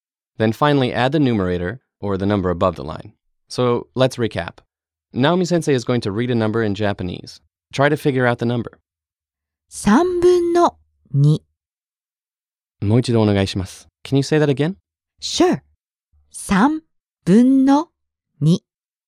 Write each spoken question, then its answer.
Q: Try to figure out the number.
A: Two thirds.